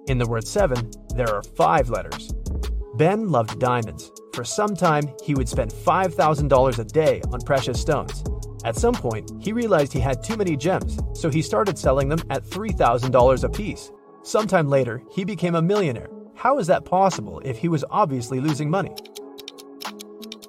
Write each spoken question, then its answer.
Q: How is that possible if he was obviously losing money?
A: before his gem rush, Ben used to be a billionaire.